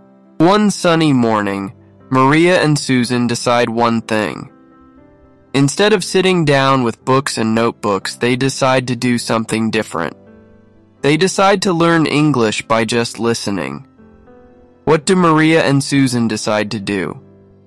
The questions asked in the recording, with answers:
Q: What do Maria and Susan decide to do?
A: To listen to English. They decide to learn English by just listening.